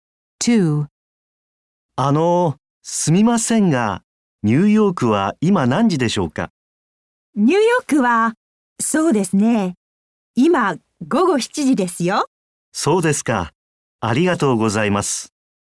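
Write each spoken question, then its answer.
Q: すみませんが、ニューヨークは今何時でしょうか?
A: 午後7時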